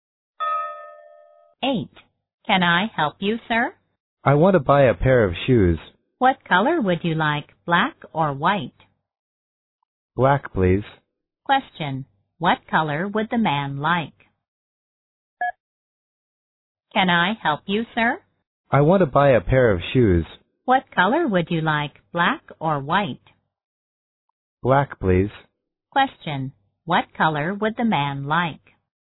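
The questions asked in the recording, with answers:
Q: What color would the man like?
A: Black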